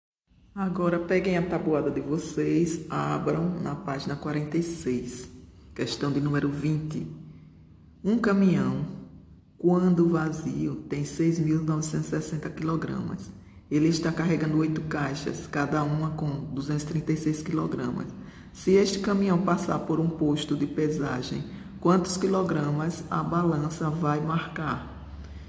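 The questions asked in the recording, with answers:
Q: Se este caminhão passar por um posto de pesagem, quantos quilogramas a balança vai marcar?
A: 8.848 quilogramas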